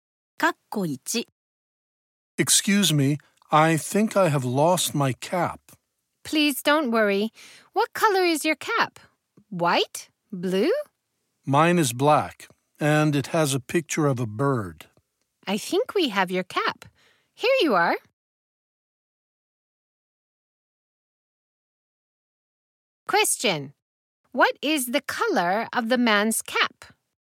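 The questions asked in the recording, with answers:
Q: What is the color of the man's cap?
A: Black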